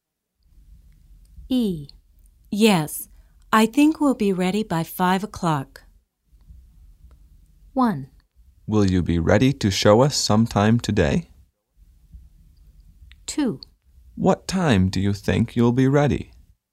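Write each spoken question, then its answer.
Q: Yes, I think we'll be ready by 5 o'clock.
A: 1: Will you be ready to show us sometime today?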